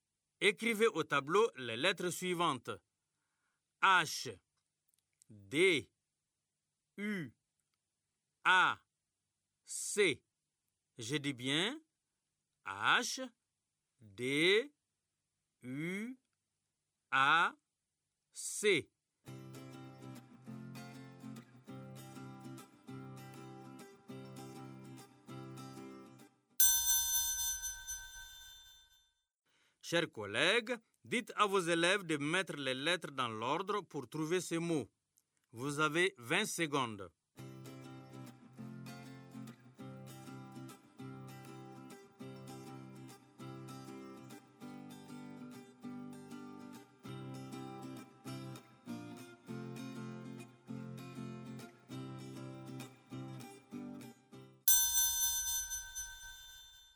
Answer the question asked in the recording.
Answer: Chaud, monsieur.